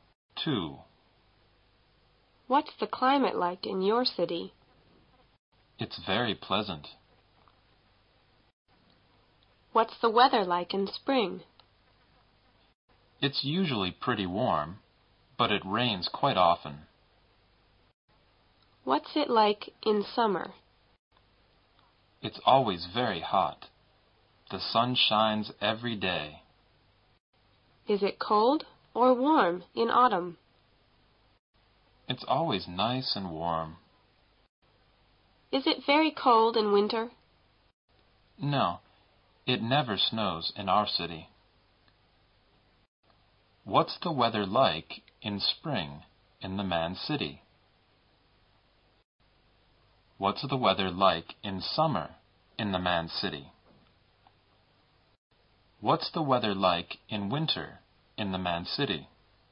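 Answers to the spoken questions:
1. Pretty warm, but it rains quite often
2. Always very hot and sunny
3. Not very cold; it never snows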